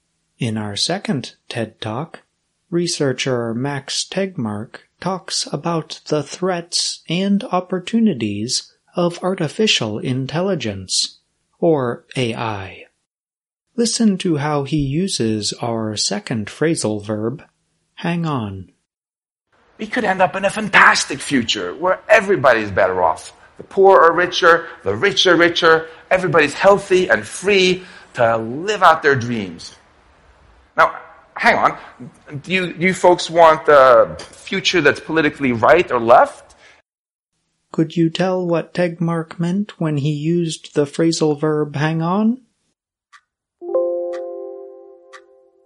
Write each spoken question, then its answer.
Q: Could you tell what Tegmark meant when he used the phrasal verb hang on?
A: hang on means wait for a short time